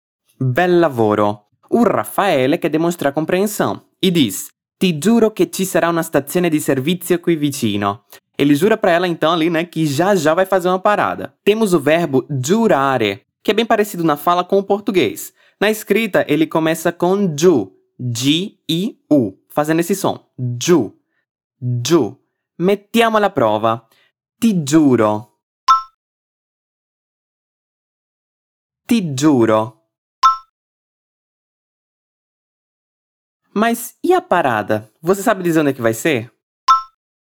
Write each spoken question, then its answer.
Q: Mas e a parada? Você sabe dizer onde é que vai ser?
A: Segundo ele, tem um posto de gasolina perto dali.